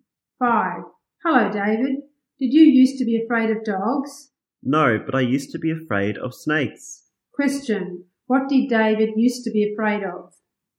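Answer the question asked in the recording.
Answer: Snakes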